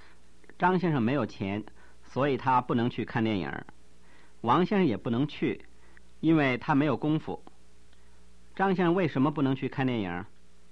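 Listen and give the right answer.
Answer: 因为他没有钱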